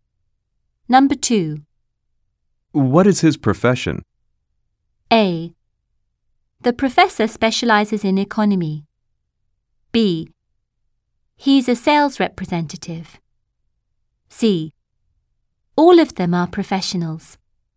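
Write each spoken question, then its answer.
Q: What is his profession?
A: B: He's a sales representative.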